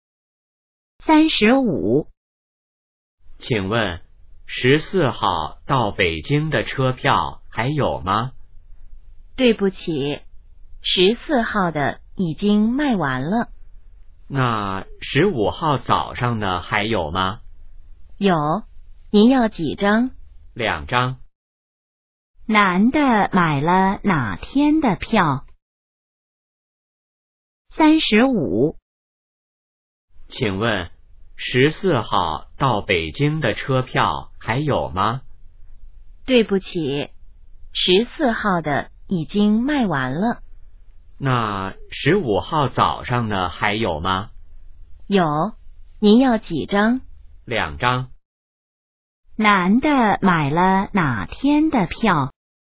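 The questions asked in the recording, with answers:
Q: 男的买了哪天的票?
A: 15号(早上)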